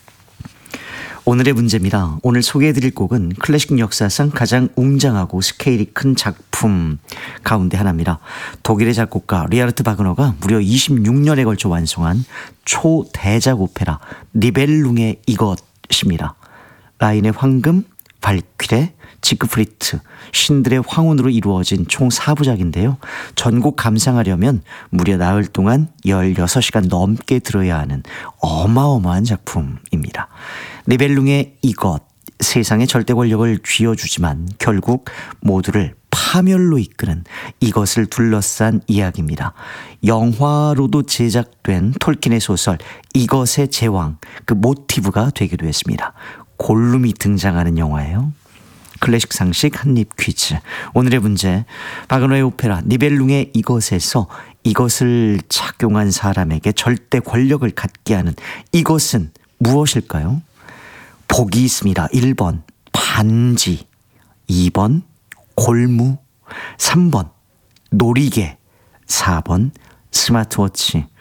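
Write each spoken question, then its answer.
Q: 바그너의 오페라 니벨룽의 이것에서 이것을 착용한 사람에게 절대 권력을 갖게 하는 이것은 무엇일까요?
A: 1번: 반지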